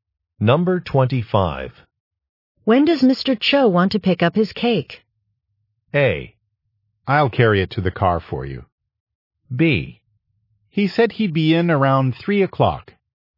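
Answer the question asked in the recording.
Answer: B: He said he'd be in around 3 o'clock.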